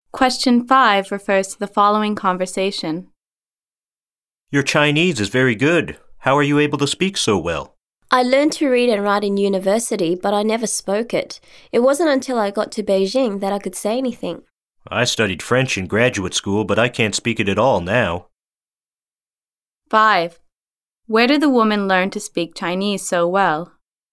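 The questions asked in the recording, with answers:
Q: Where did the woman learn to speak Chinese so well?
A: In Beijing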